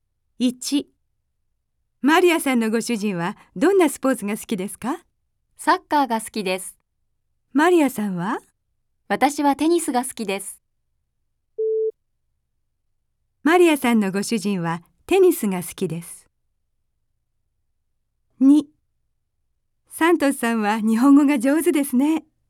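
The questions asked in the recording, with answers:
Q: マリアさんのご主人はテニスが好きです。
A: ×(サッカーが好きです)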